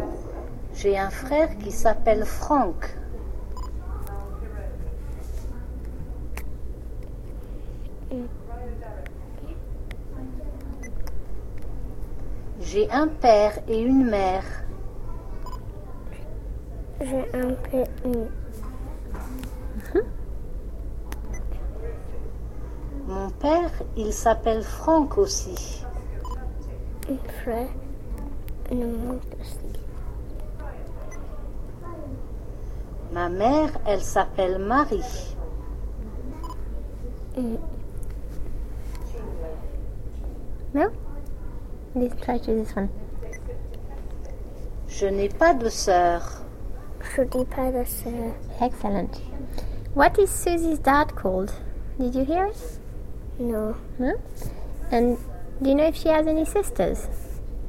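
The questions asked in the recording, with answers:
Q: What is Susie's dad called?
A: Franck

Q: And do you know if she has any sisters?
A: No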